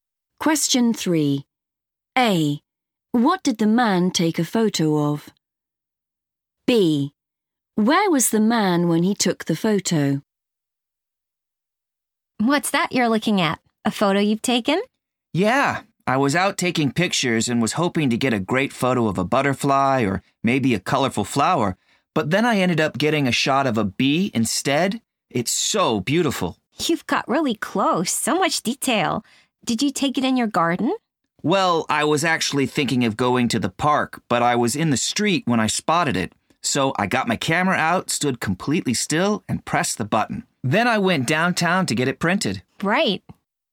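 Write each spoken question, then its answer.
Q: What did the man take a photo of?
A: a bee

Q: Where was the man when he took the photo?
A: in the street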